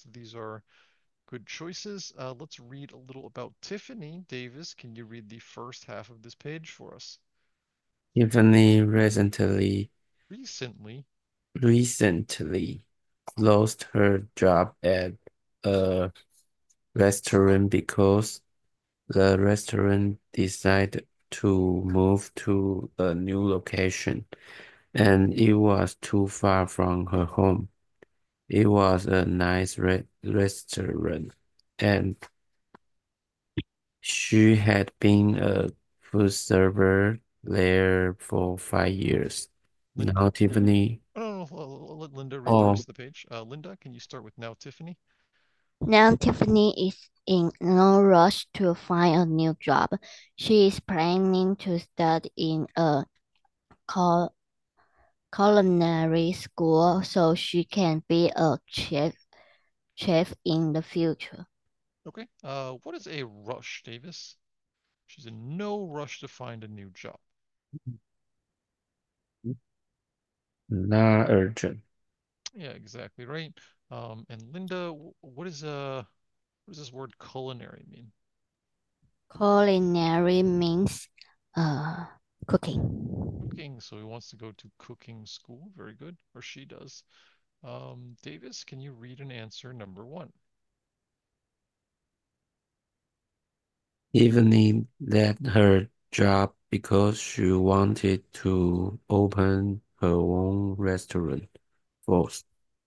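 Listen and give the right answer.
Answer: False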